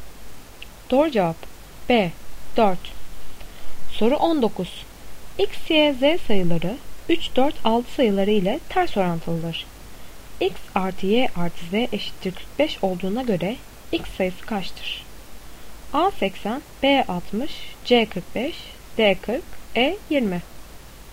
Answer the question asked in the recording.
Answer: Doğru cevap E 20.